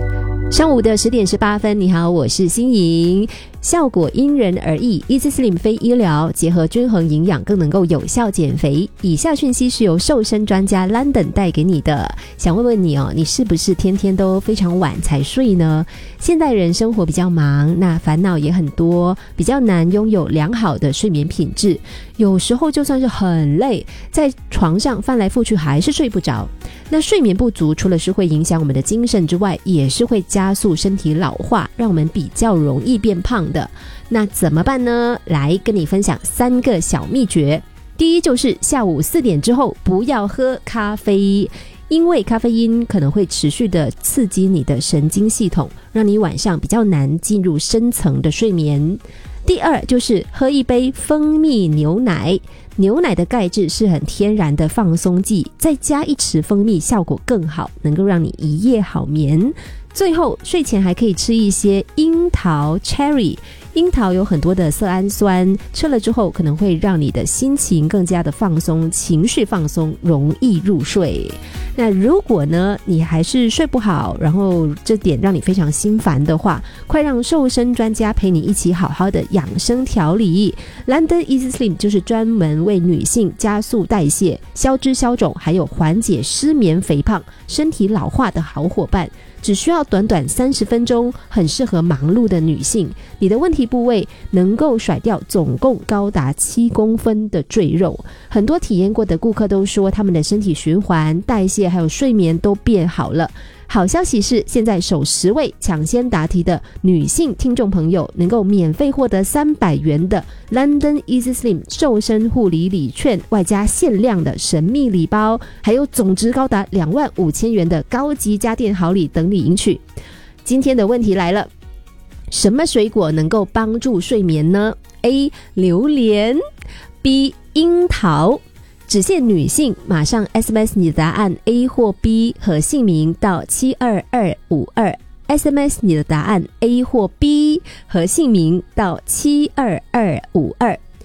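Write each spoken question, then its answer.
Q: 什么水果能够帮助睡眠呢? A. 榴莲, B. 樱桃。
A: B: 樱桃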